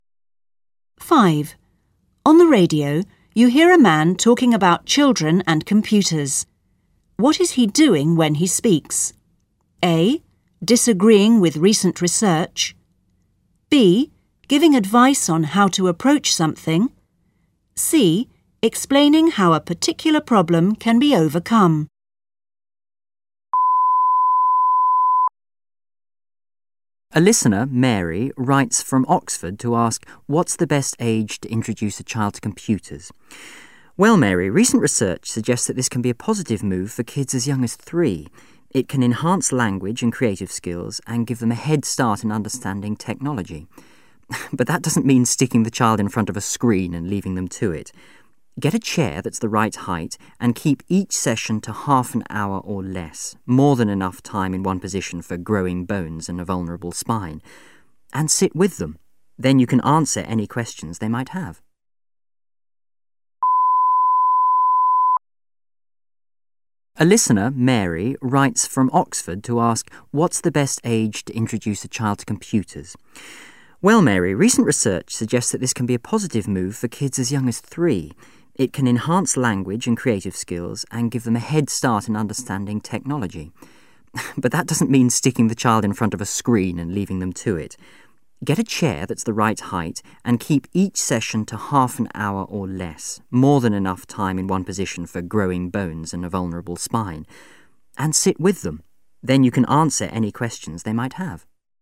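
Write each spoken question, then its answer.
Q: What is he doing when he speaks?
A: B: Giving advice on how to approach something.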